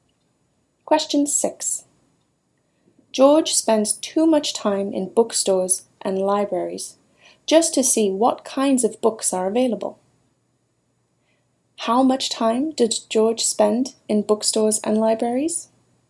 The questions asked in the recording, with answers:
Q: How much time did George spend in bookstores and libraries?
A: He spends too much time in bookstores and libraries.